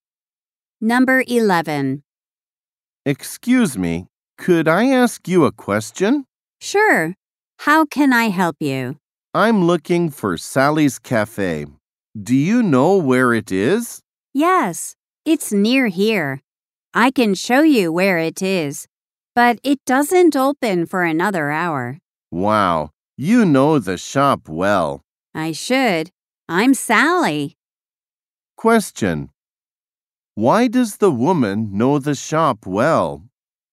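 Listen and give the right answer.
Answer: She is Sally, the owner.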